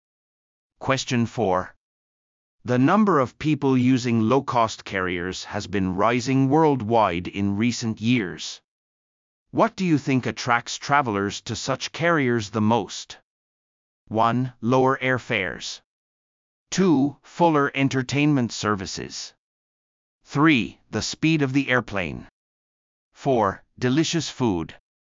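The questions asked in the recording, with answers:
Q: What do you think attracts travelers to such carriers the most?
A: 1: Lower airfares.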